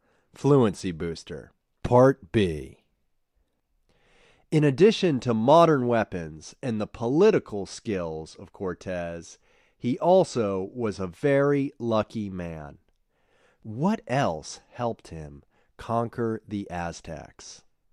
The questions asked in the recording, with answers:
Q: What else helped him conquer the Aztecs?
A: Luck helped him conquer the Aztecs.